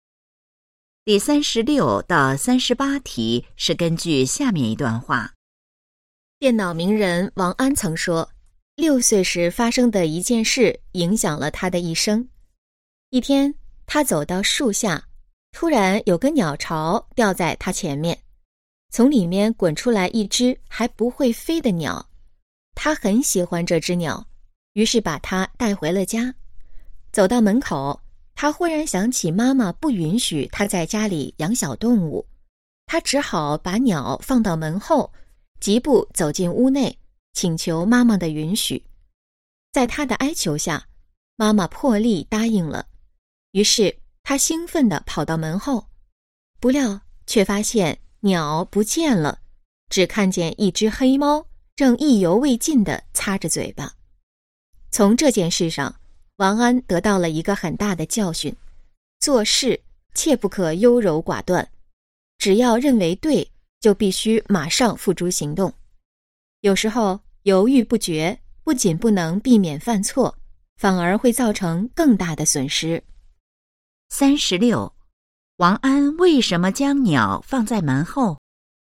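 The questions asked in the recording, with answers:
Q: 王安为什么将鸟放在门后?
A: 因为妈妈不允许他在家里养小动物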